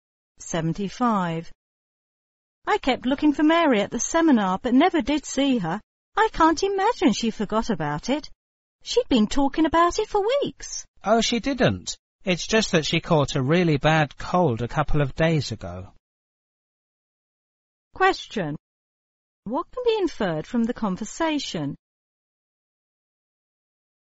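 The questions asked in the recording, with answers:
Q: What can be inferred from the conversation?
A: Mary missed the seminar because she was sick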